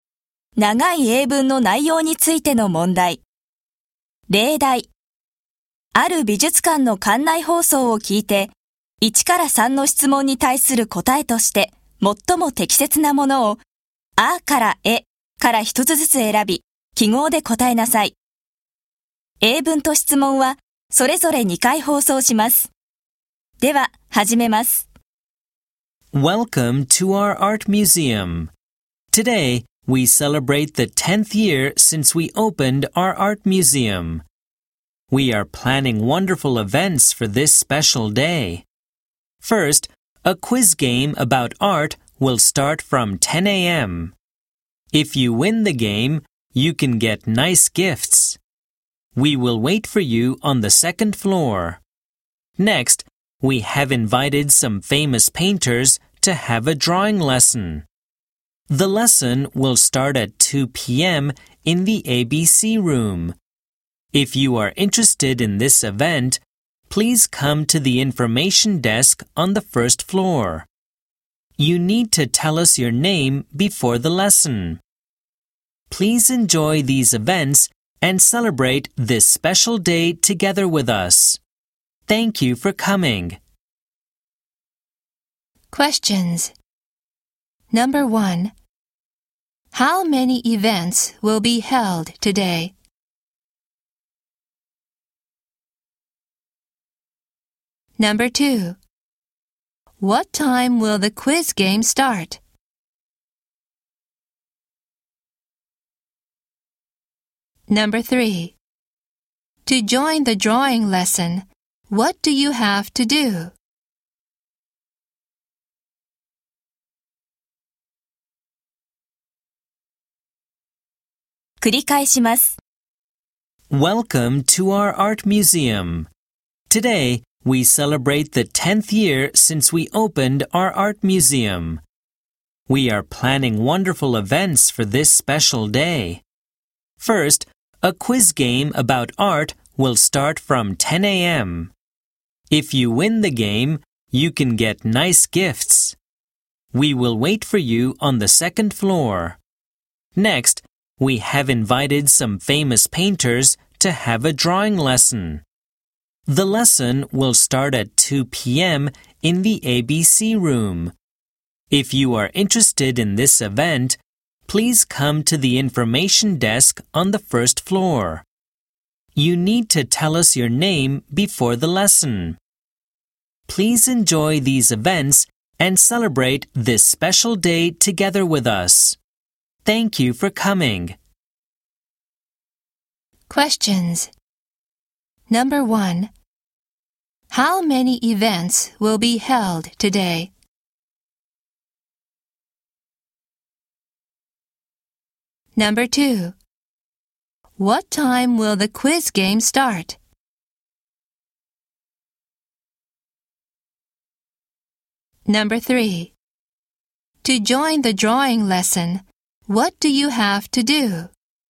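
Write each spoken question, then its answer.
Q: How many events will be held today?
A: Two

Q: What time will the quiz game start?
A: At 10 a.m.

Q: To join the drawing lesson, what do you have to do?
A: Tell their name at the information desk on the first floor before the lesson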